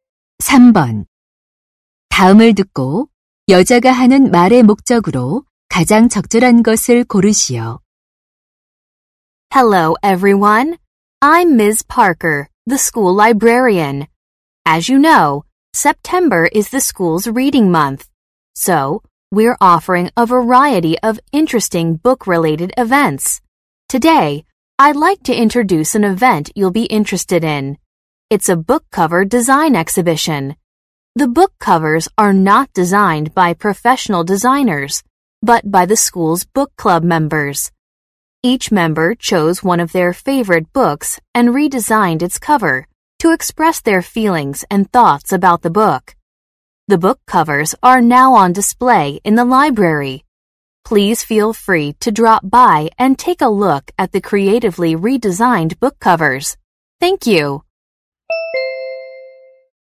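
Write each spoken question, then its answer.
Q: 다음을 듣고 여자가 하는 말의 목적으로 가장 적절한 것을 고르시오.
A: 도서 표지 디자인 전시회를 소개하려고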